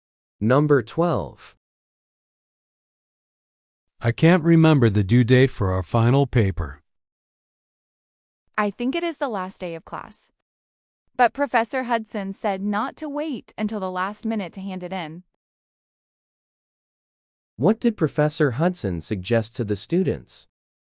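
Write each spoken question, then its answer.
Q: What did Professor Hudson suggest to the students?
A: Hand in the paper before the last minute.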